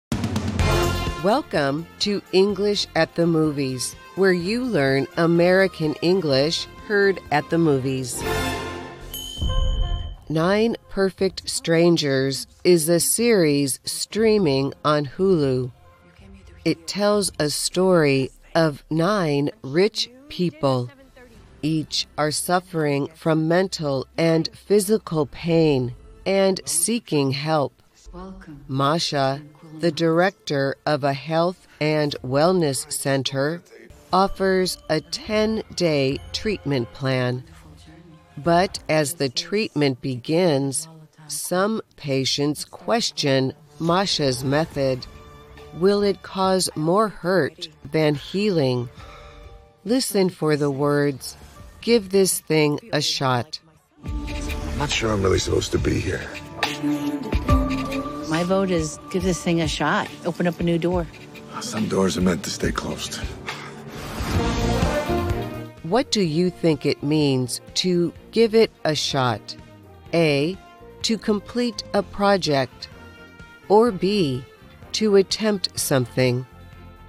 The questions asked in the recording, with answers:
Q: What do you think it means to give it a shot?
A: The answer is B, to attempt something.